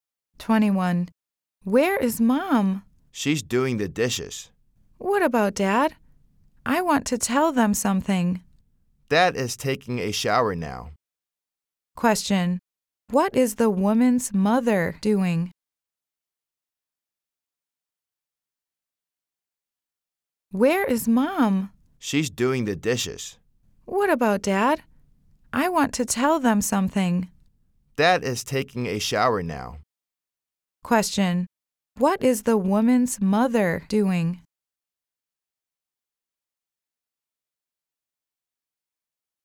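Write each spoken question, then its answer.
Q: Question. What is the woman's mother doing?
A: Doing the dishes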